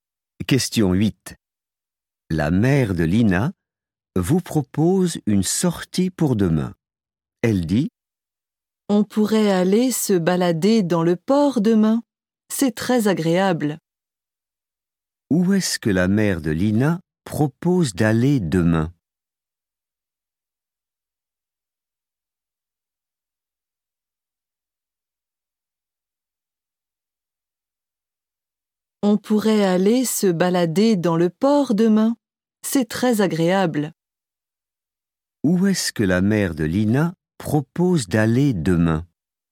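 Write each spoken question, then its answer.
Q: Où est-ce que la mère de Lina propose d'aller demain?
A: au port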